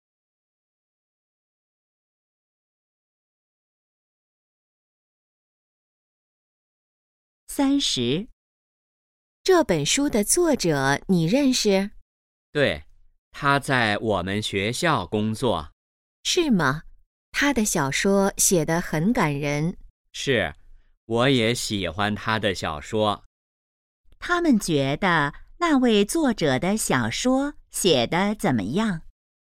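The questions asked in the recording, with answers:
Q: 他们觉得那位作者的小说写得怎么样?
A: 很感人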